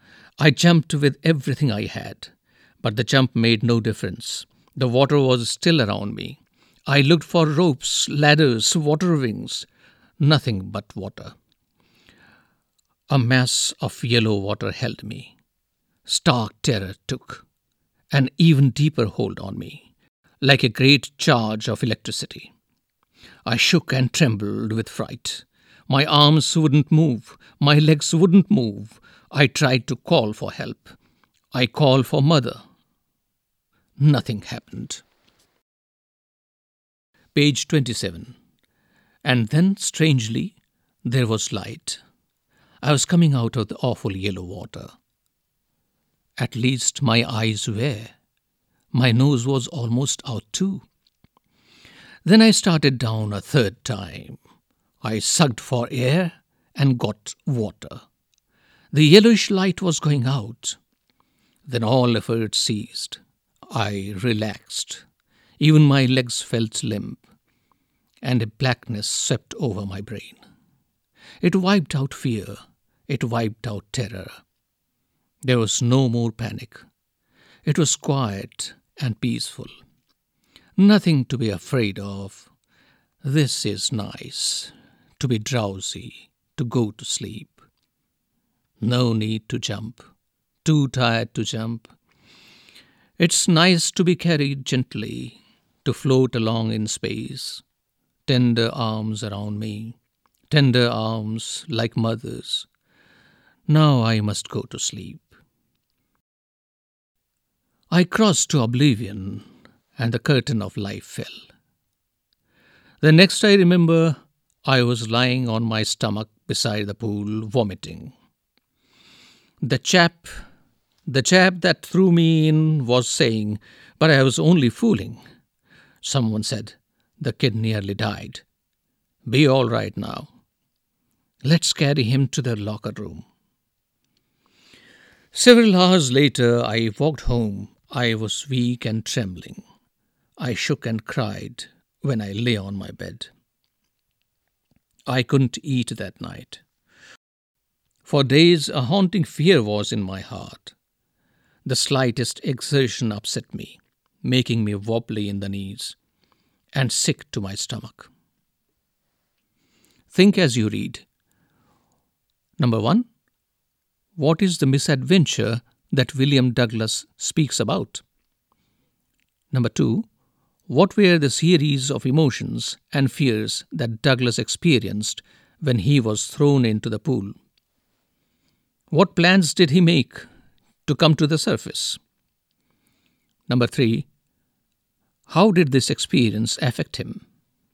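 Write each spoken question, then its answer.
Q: what is the misadventure that William Douglas speaks about?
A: He was thrown into a swimming pool as a boy and nearly drowned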